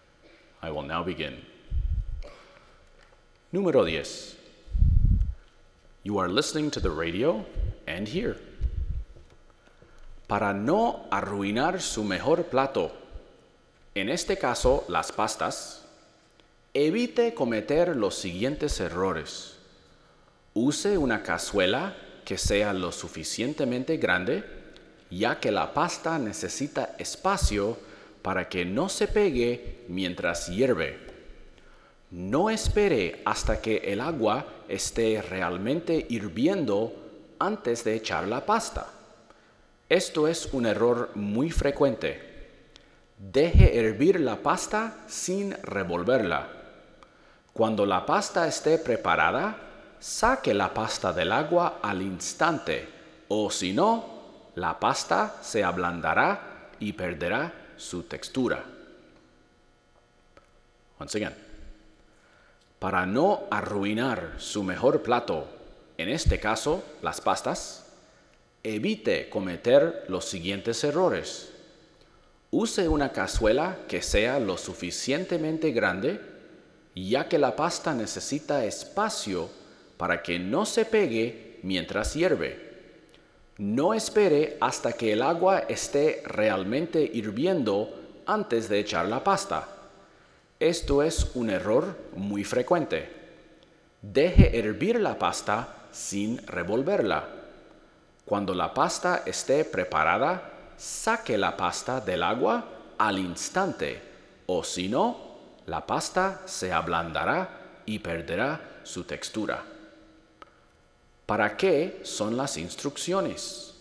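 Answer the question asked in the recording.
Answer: Para cocinar bien la pasta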